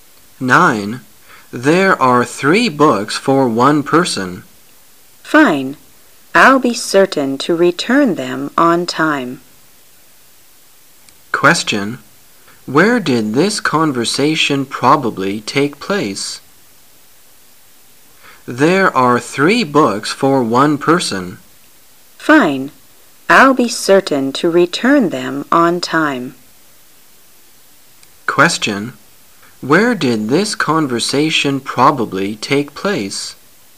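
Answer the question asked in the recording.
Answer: In a library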